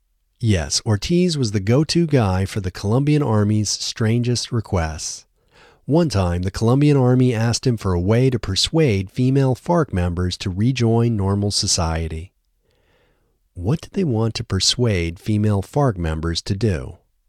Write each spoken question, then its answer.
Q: What did they want to persuade female FARC members to do?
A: They wanted to persuade female FARC members to rejoin normal society.